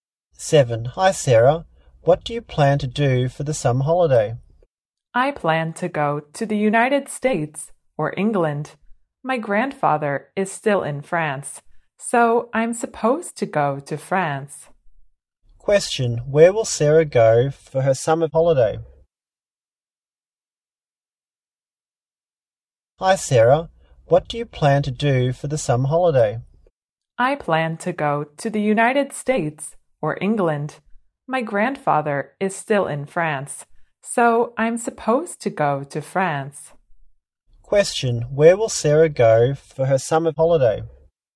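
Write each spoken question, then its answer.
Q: Where will Sarah go for her summer holiday?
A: France.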